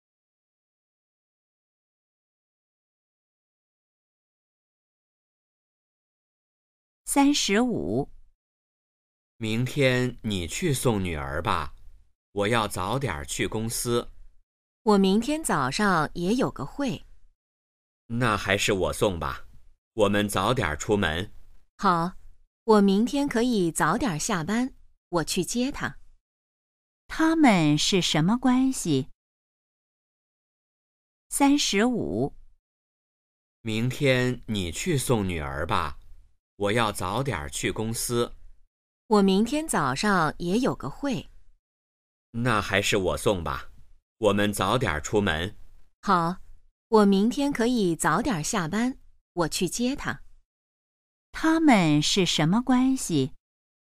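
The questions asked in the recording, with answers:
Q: 他们是什么关系?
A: 夫妻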